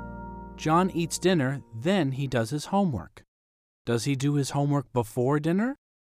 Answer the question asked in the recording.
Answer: No, he doesn't. He does his homework after dinner.